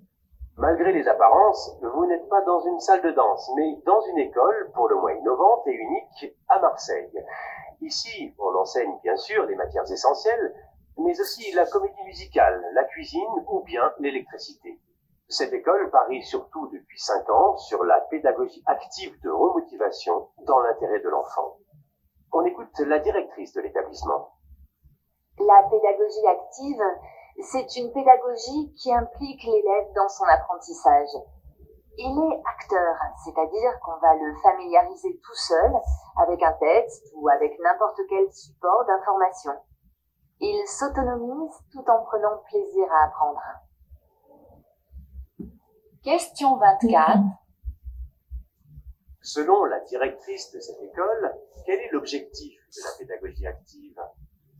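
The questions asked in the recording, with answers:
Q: Selon la directrice de cette école, quel est l'objectif de la pédagogie active ?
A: Impliquer l'élève dans son apprentissage pour qu'il devienne autonome tout en prenant plaisir à apprendre.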